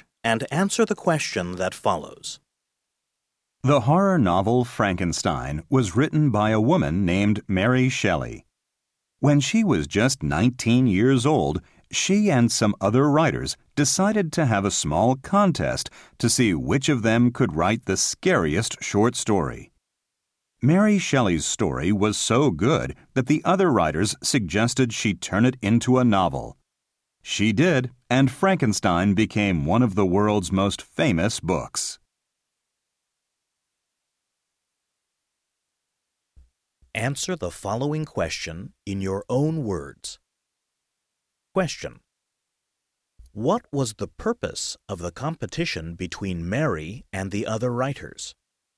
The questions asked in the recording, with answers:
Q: What was the purpose of the competition between Mary and the other writers?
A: of them could write the scariest short story.